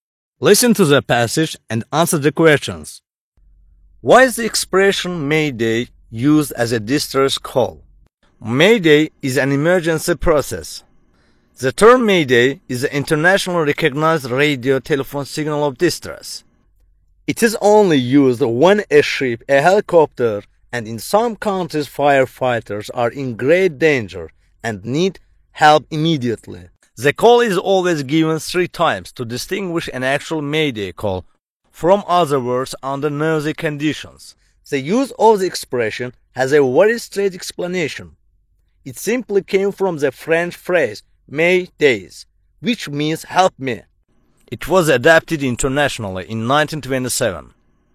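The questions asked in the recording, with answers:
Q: Why is the expression May Day used as a distress call?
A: It came from the French phrase m'aidez, which means "help me".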